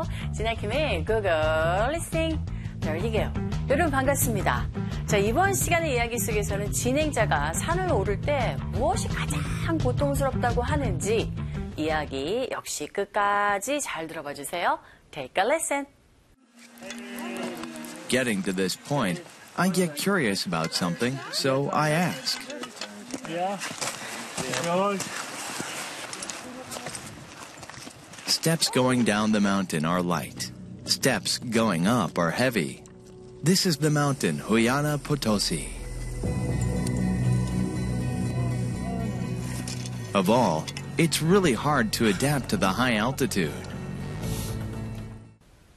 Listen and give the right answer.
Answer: 바로 높은 고도에 적응하는 것이 가장 고통스러운 모습이었고